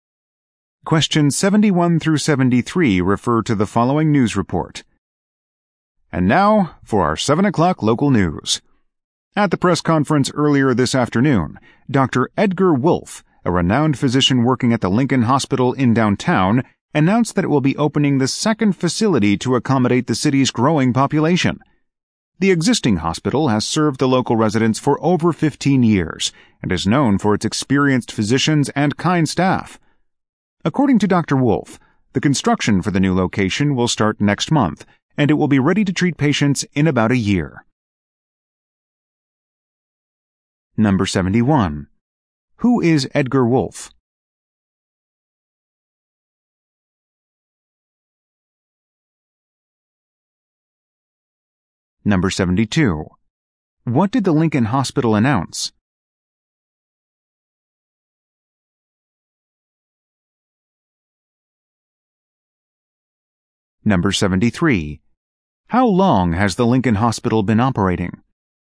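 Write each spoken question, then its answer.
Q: Who is Edgar Wolfe?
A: A physician at Lincoln Hospital

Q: What did the Lincoln Hospital announce?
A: It will open a second facility

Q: How long has the Lincoln Hospital been operating?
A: Over 15 years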